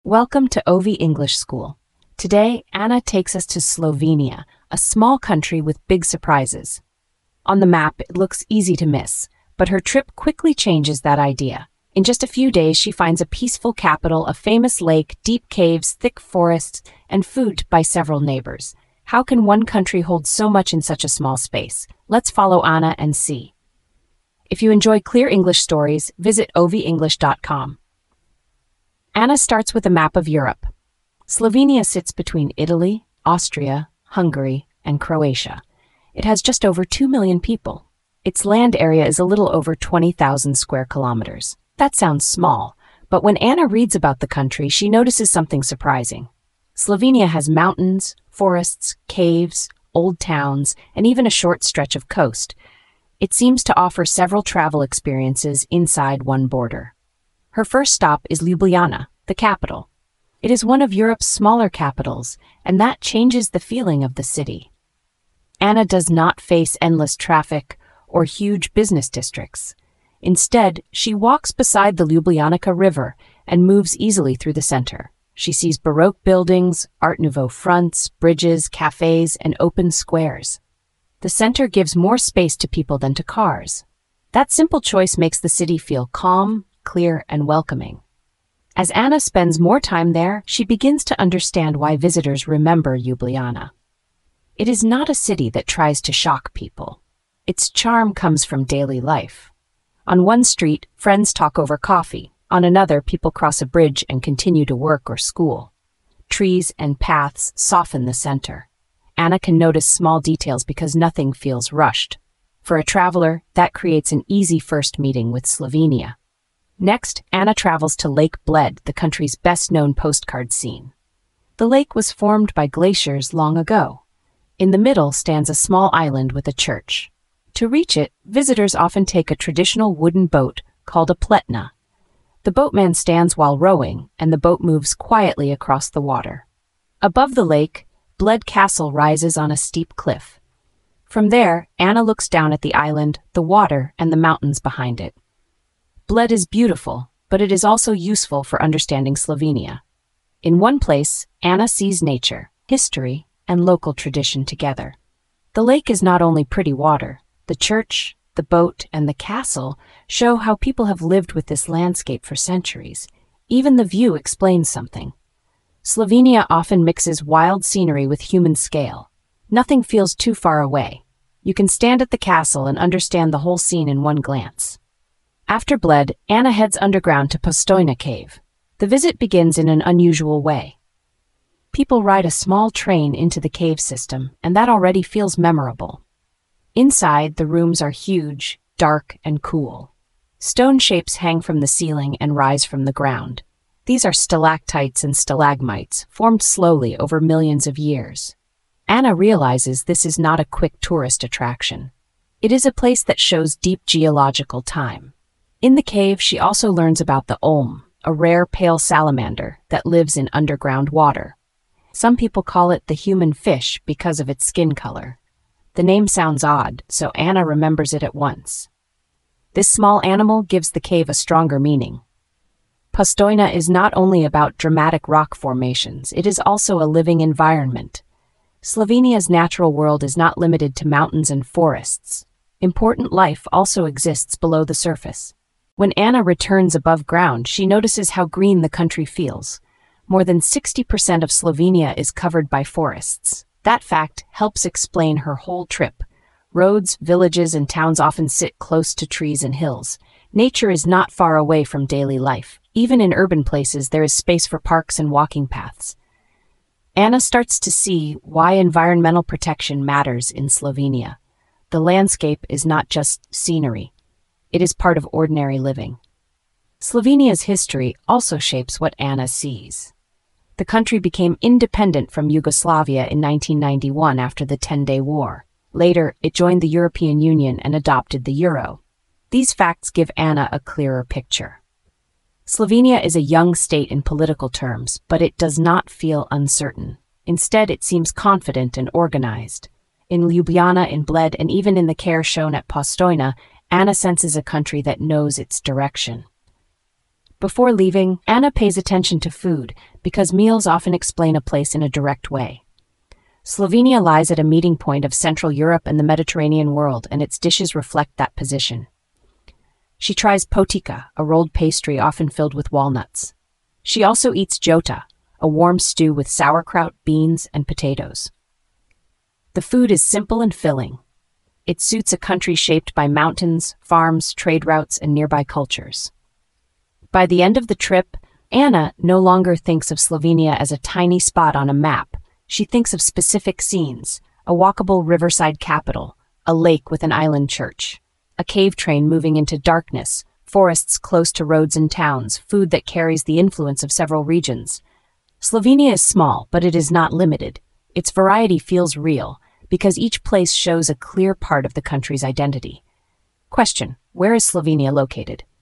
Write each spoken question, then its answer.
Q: where is Slovenia located?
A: it is in Central Europe, between Italy, Austria, Hungary, and Croatia.